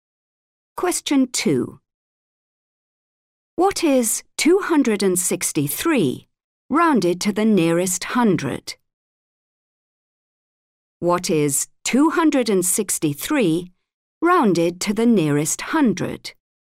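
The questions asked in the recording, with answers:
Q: What is 263 rounded to the nearest hundred?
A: 300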